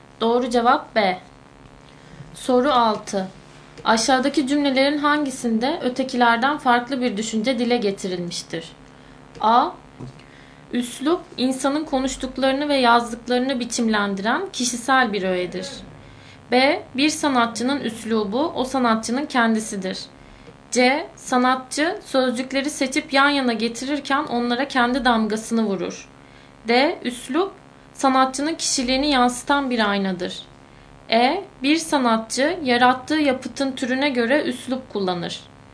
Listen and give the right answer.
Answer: Doğru cevap E.